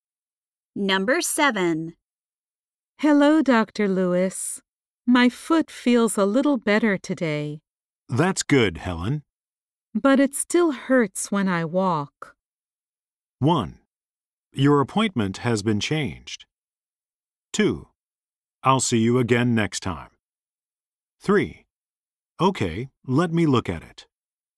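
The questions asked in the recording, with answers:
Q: But it still hurts when I walk.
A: 3: Okay, let me look at it.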